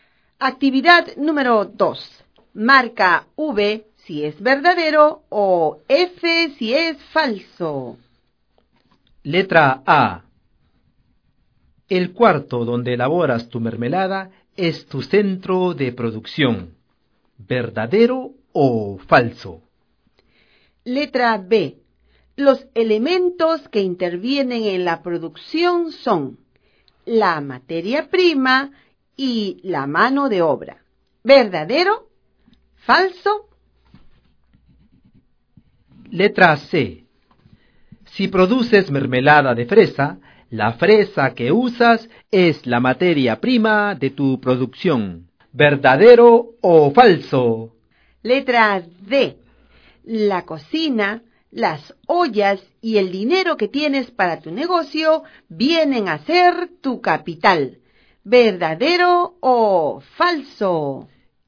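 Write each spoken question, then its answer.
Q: Los elementos que intervienen en la producción son la materia prima y la mano de obra.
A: Falso (también el capital)

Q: La cocina, las ollas y el dinero que tienes para tu negocio vienen a ser tu capital.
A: Verdadero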